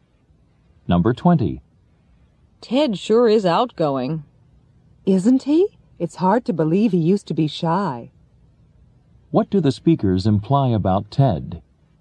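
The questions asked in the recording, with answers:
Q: What do the speakers imply about Ted?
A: He used to be shy but is now outgoing.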